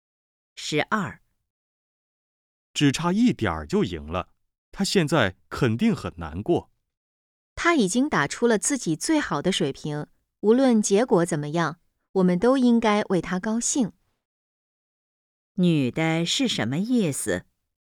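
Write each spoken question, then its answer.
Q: 女的是什么意思?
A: 应该为他高兴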